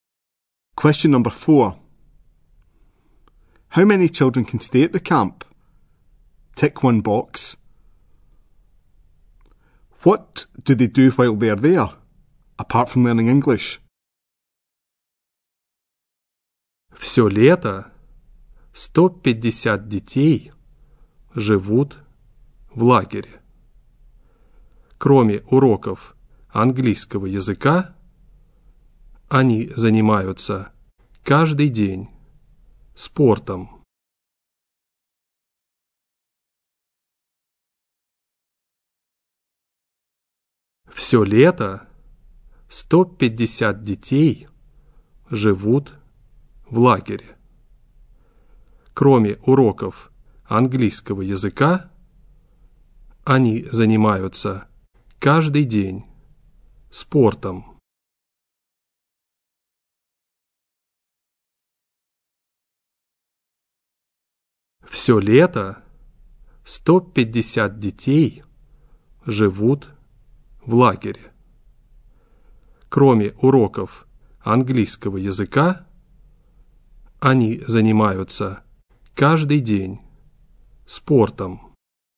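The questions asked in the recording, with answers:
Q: What do they do while they are there, apart from learning English?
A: Sport every day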